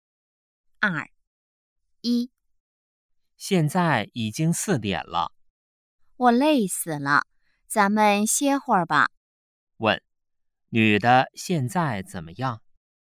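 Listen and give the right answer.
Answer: 很累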